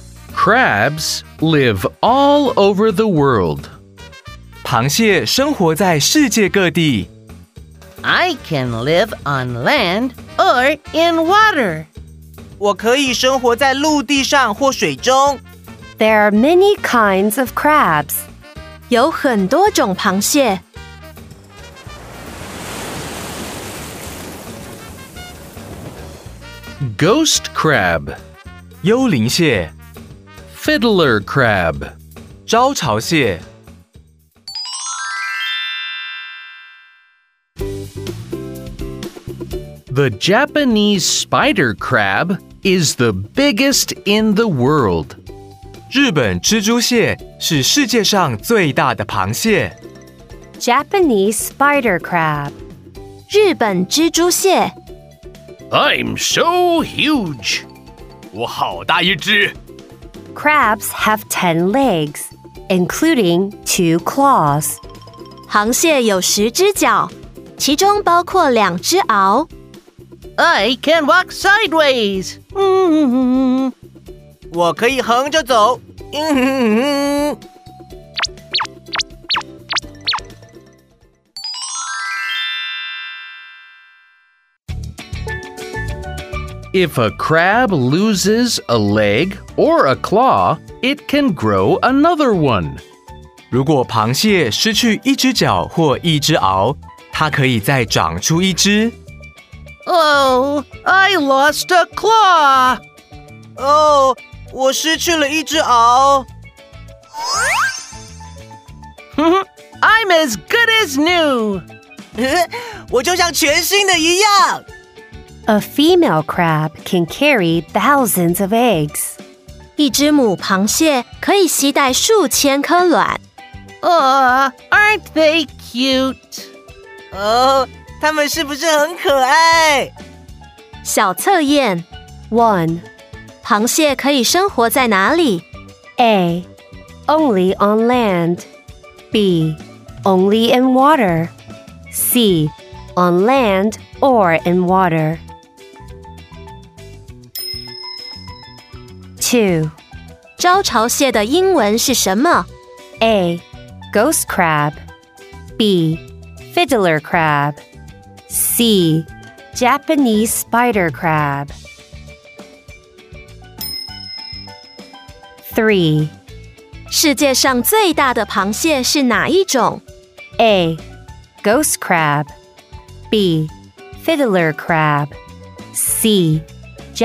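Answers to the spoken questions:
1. C: On land or in water.
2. B: Fiddler crab
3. C: Japanese spider crab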